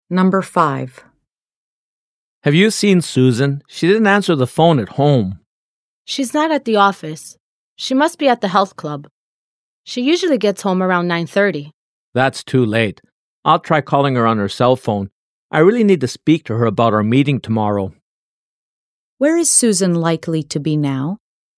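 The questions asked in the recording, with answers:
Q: Where is Susan likely to be now?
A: At the health club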